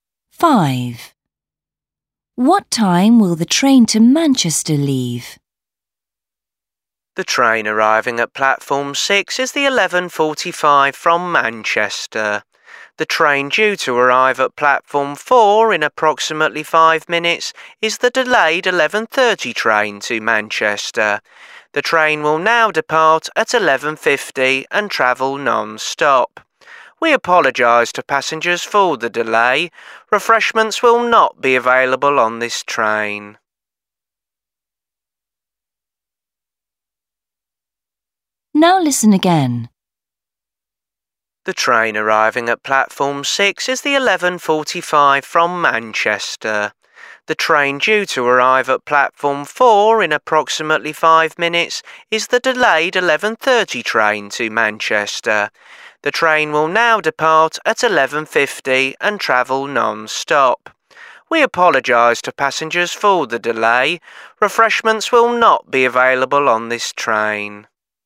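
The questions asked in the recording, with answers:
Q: What time will the train to Manchester leave?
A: 11:50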